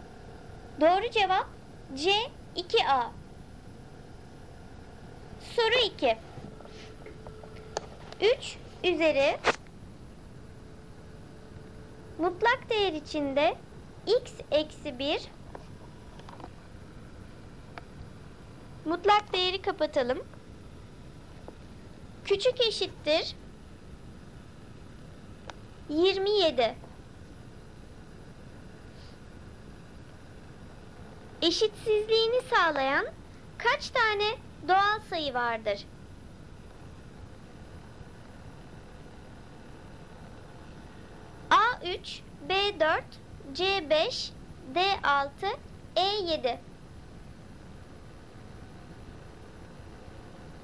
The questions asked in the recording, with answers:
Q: eşitsizliğini sağlayan kaç tane doğal sayı vardır?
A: Doğru cevap C 5.